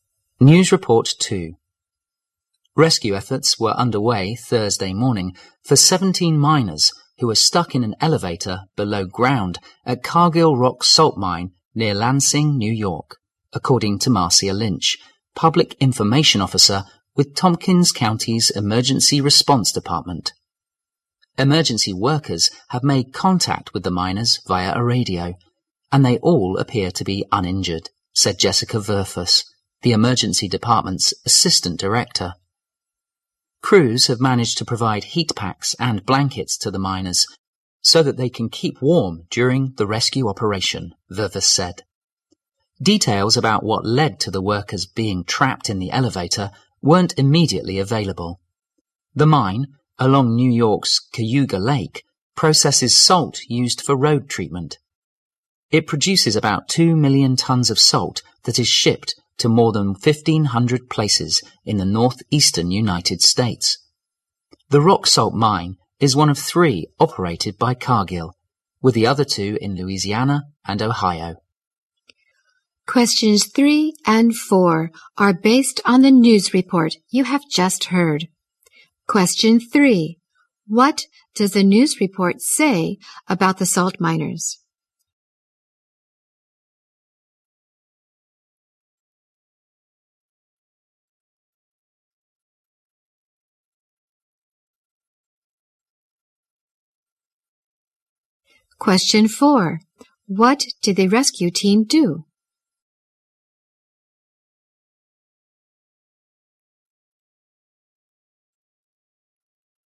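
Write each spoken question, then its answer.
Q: What does the news report say about the salt miners?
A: 17 miners were stuck in an elevator below ground, uninjured

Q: What did the rescue team do?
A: Provided heat packs and blankets to keep the miners warm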